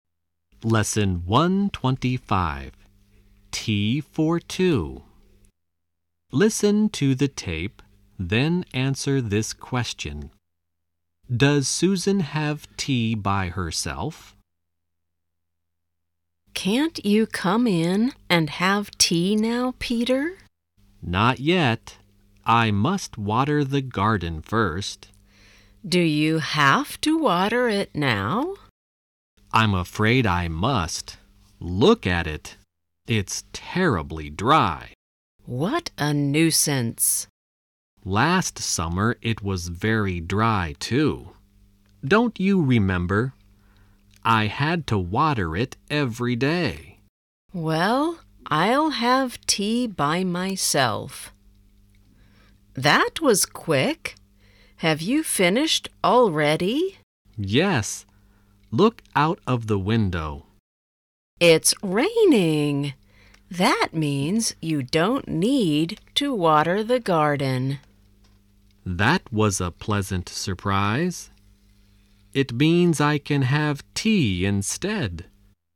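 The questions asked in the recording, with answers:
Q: Does Susan have tea by herself?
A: No, it started raining, so Peter didn't need to water the garden and had tea with her.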